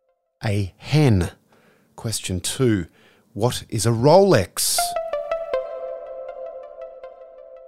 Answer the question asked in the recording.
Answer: It's a very expensive watch.